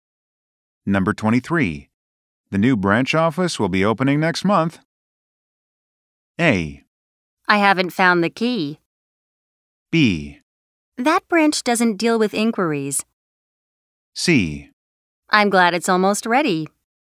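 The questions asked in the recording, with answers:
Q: The new branch office will be opening next month.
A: C: I'm glad it's almost ready.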